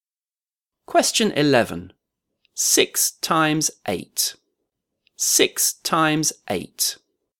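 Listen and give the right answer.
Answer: 48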